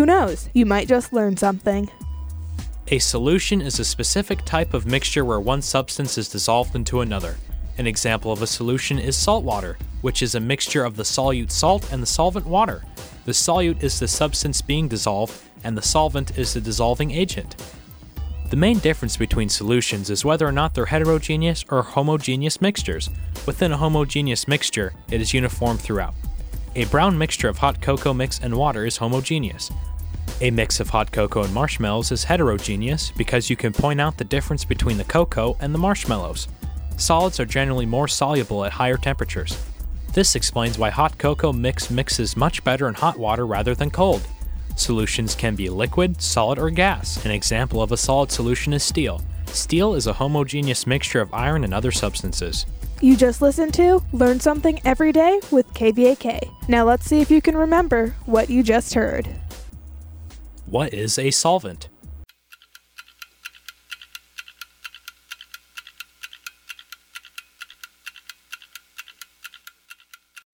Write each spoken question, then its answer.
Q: What is a solvent?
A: A solvent is a dissolving agent within a solution.